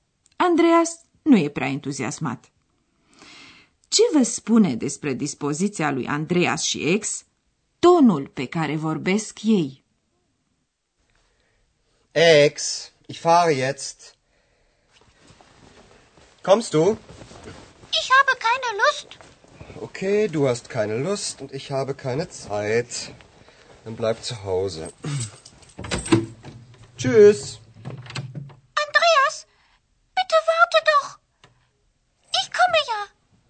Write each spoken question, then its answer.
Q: Ce vă spune despre dispoziția lui Andreas și ex tonul pe care vorbesc ei?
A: Ați remarcat, desigur, că atât Andreas cât și ex n-au niciun chef și că Andreas e cam enervat.